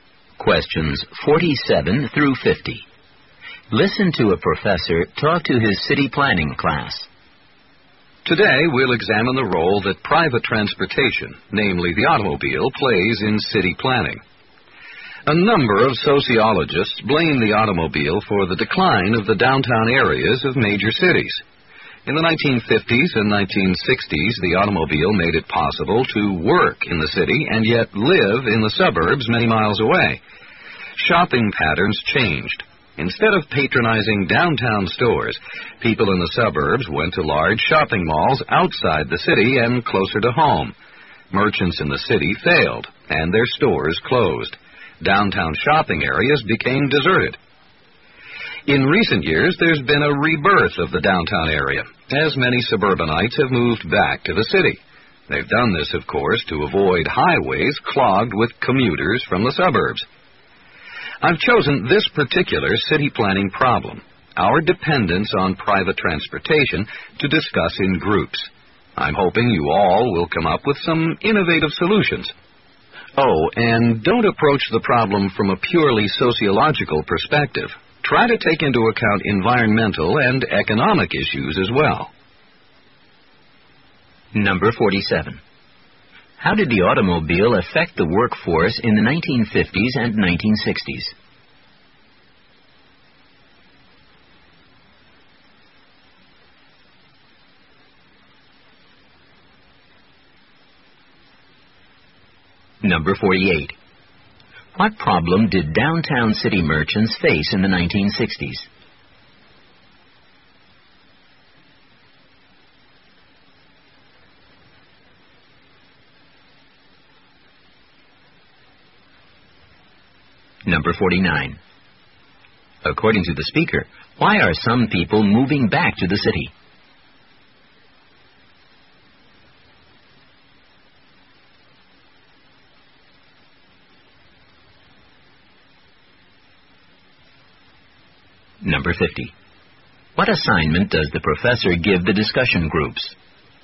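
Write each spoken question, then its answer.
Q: How did the automobile affect the workforce in the 1950s and 1960s?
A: It let people work in the city while living in the suburbs far away

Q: What problem did downtown city merchants face in the 1960s?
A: Shoppers went to suburban malls instead, so their stores failed and closed

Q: According to the speaker, why are some people moving back to the city?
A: To avoid highways clogged with commuters

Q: What assignment does the professor give the discussion groups?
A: To come up with innovative solutions to our dependence on private transportation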